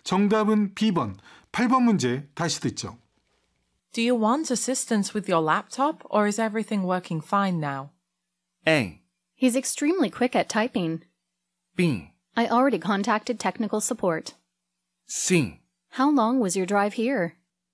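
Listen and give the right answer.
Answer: B: I already contacted technical support.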